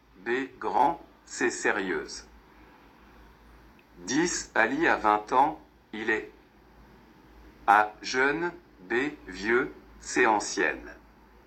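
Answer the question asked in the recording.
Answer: A: Jeune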